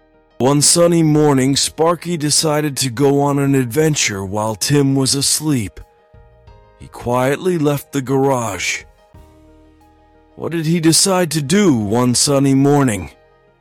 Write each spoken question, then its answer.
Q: What did he decide to do one sunny morning?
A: Go on an adventure. He decided to go on an adventure.